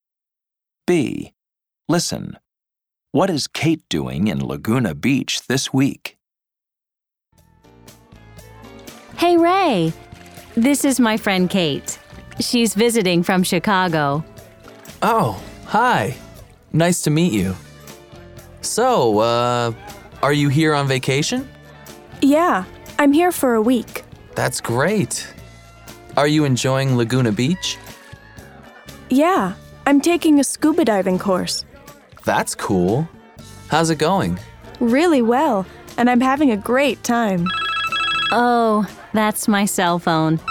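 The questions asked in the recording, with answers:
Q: What is Kate doing in Laguna Beach this week?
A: She's on vacation and taking a scuba diving course.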